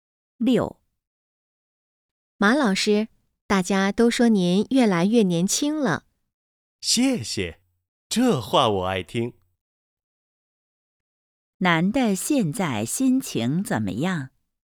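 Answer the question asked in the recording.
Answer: 很高兴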